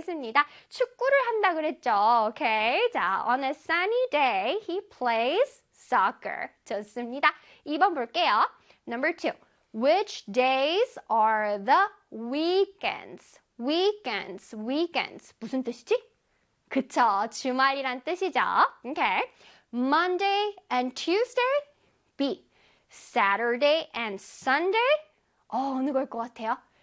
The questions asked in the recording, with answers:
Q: Which days are the weekends?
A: Saturday and Sunday가 되겠죠.